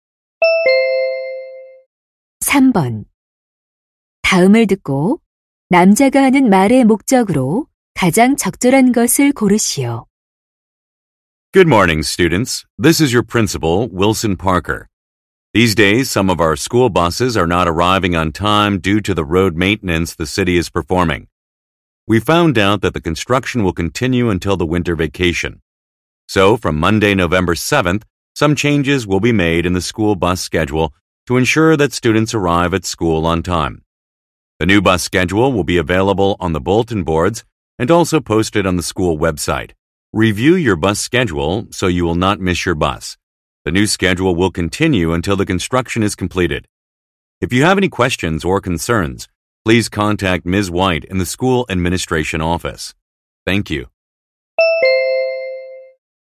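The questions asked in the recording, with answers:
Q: 다음을 듣고 남자가 하는 말의 목적으로 가장 적절한 것을 고르시오.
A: 도로 공사로 인한 스쿨버스 시간표 변경을 안내하려고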